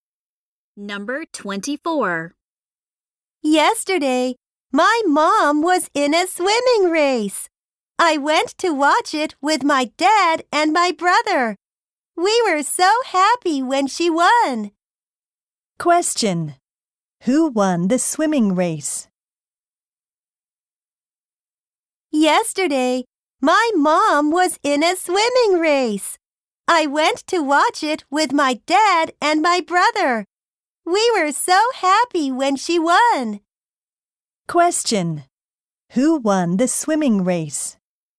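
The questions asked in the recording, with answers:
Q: Question. Who won the swimming race?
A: The speaker's mother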